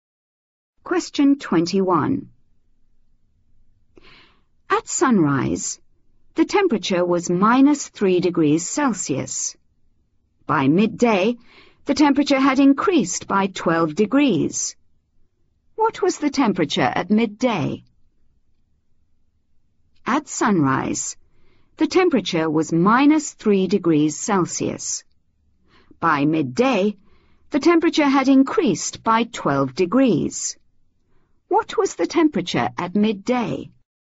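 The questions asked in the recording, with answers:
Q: What was the temperature at midday?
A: 9 degrees Celsius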